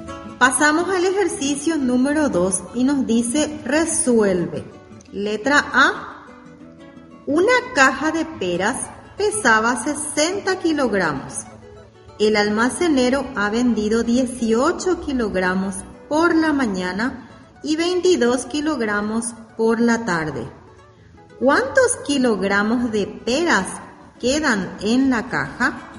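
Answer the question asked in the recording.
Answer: 20 kilogramos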